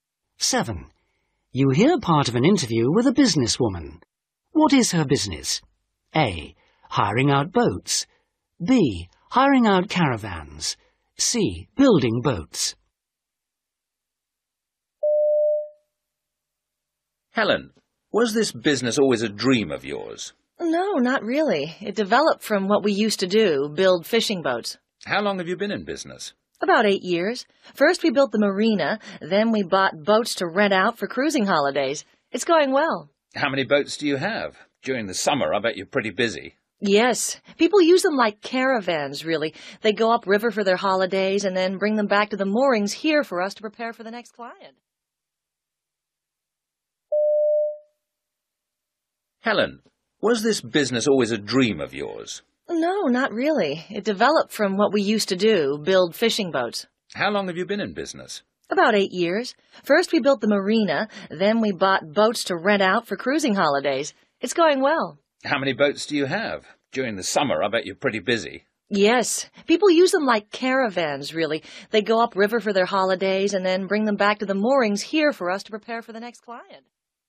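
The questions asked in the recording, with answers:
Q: What is her business?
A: A: Hiring out boats.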